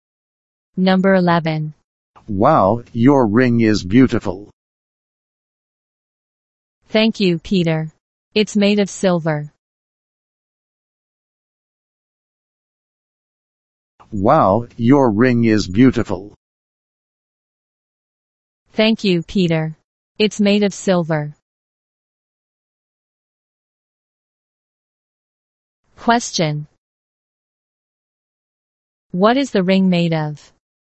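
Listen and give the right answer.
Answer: Silver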